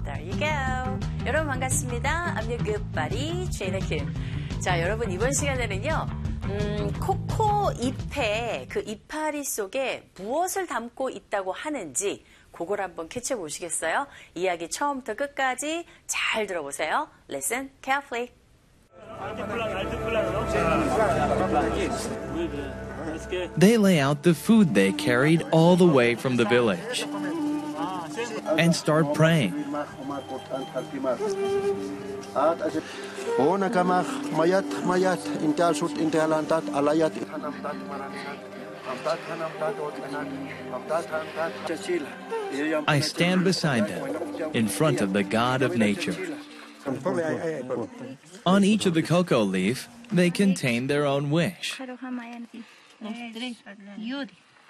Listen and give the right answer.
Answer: 잎 하나하나에 사람들의 그 소망이 담겨있다